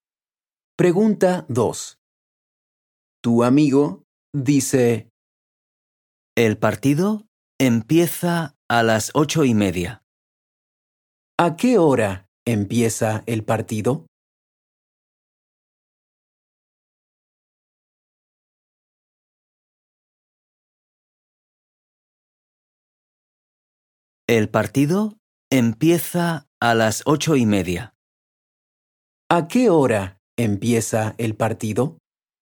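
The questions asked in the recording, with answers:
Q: ¿A qué hora empieza el partido?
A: A las 8:30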